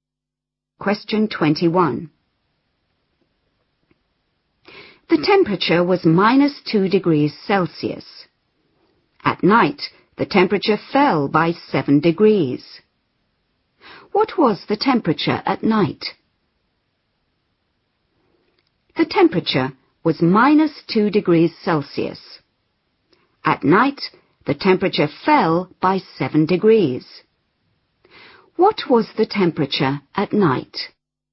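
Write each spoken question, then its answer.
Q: What was the temperature at night?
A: -9 degrees Celsius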